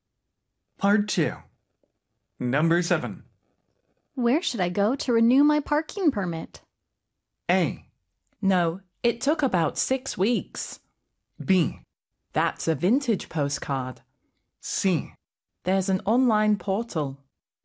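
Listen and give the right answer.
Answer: C: There's an online portal.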